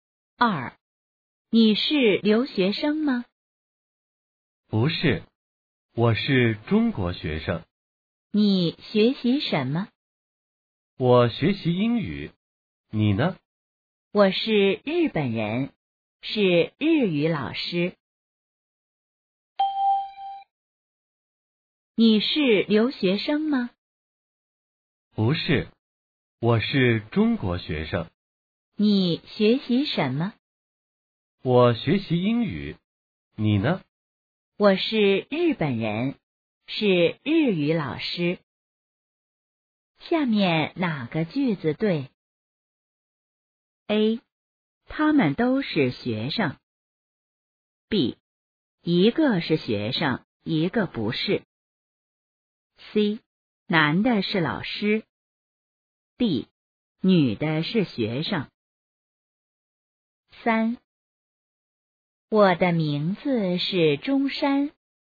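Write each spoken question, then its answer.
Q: 下面哪个句子对?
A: B: 一个是学生,一个不是。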